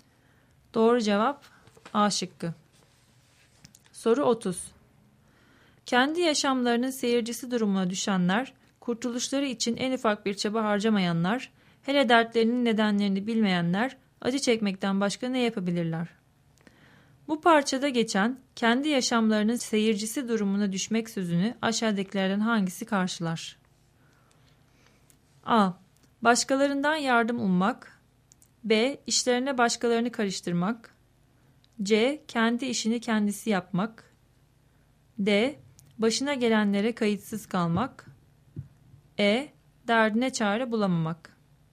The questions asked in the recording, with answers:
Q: Bu parçada geçen kendi yaşamlarının seyircisi durumuna düşmek sözünü aşağıdakilerden hangisi karşılar?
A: Doğru cevap D şıkkı.